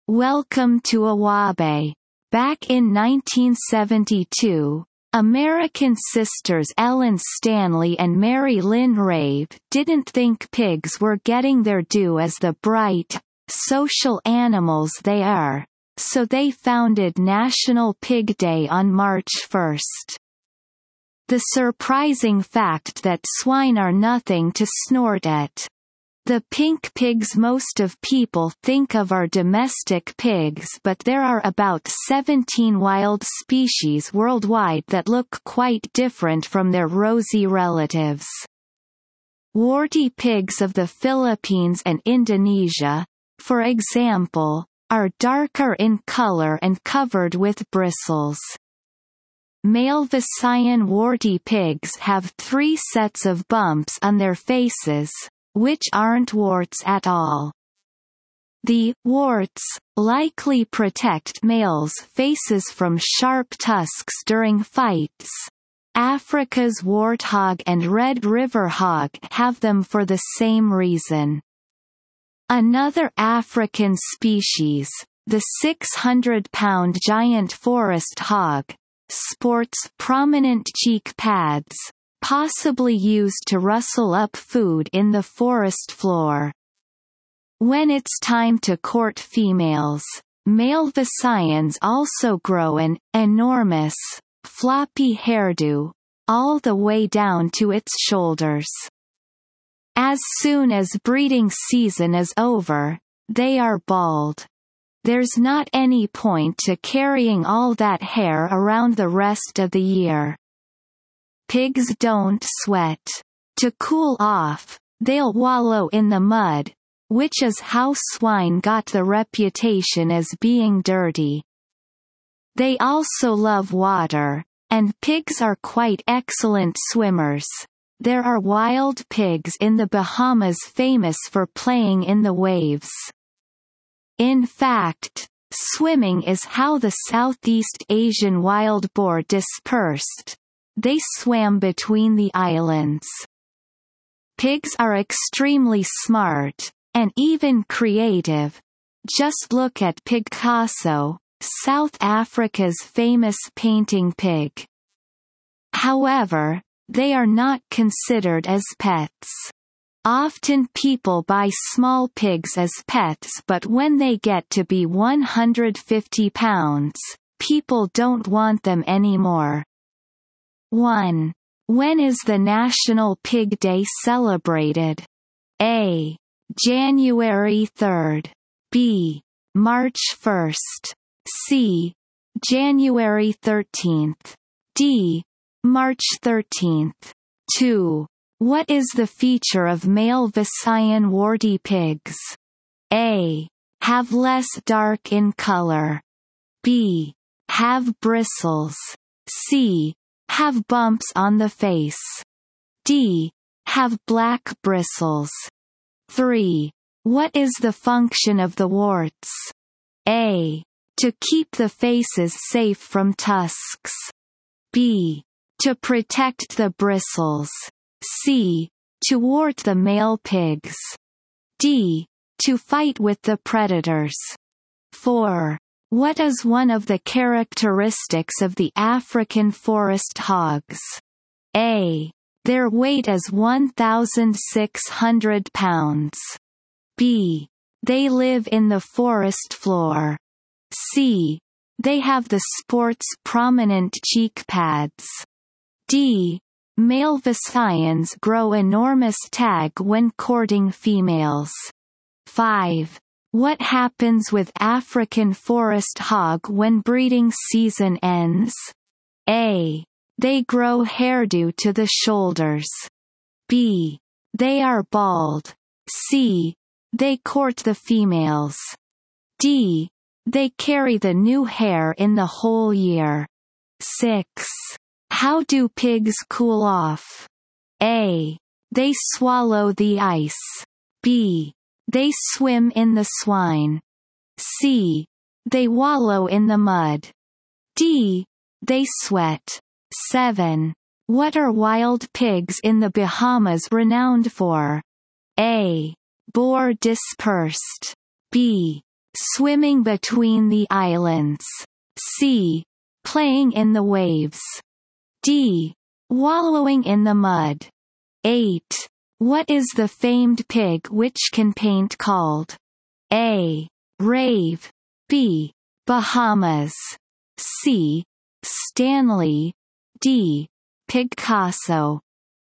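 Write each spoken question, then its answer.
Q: When is the National Pig Day celebrated?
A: B: March 1

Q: What is the feature of male Visayan warty pigs?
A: C: Have bumps on the face

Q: What is the function of the warts?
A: A: To keep the faces safe from tusks

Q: What is one of the characteristics of the African forest hogs?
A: C: They have the sport's prominent cheek pads

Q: How do pigs cool off?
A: C: They wallow in the mud

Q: What are wild pigs in the Bahamas renowned for?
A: C: Playing in the waves

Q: What is the famed pig which can paint called?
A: D: Picasso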